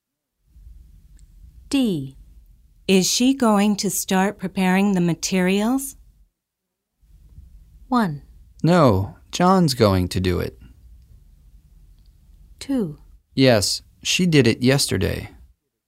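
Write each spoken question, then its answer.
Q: Is she going to start preparing the materials?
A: 1: No, John's going to do it.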